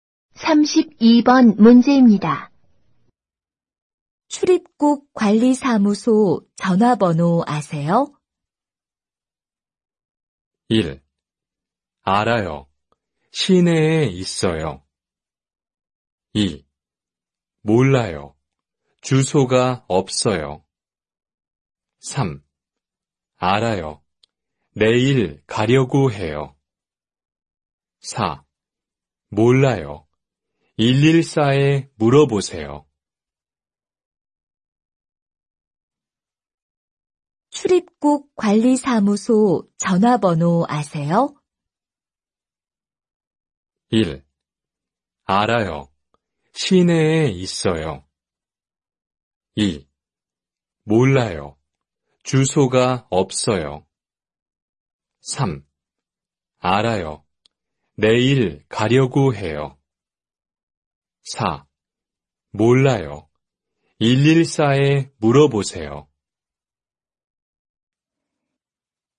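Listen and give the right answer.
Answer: 4: 몰라요. 114에 물어보세요.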